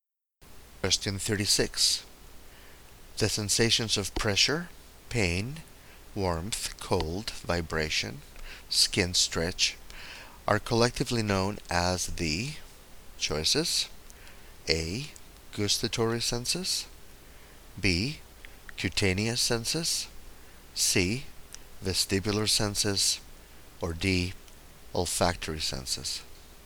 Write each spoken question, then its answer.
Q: The sensations of pressure, pain, warmth, cold, vibration, skin stretch are collectively known as the choices: A.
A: The correct choice here is B.